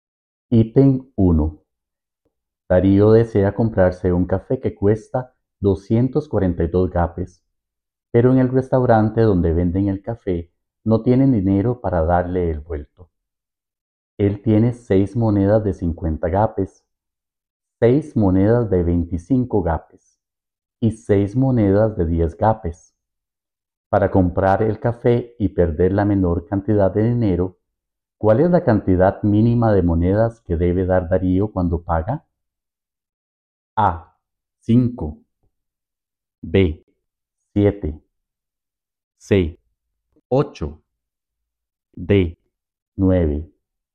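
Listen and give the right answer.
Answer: B: 7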